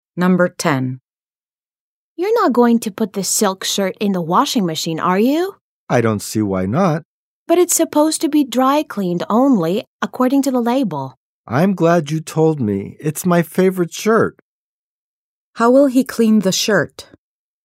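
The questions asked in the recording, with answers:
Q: How will he clean the shirt?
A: He will have it dry cleaned.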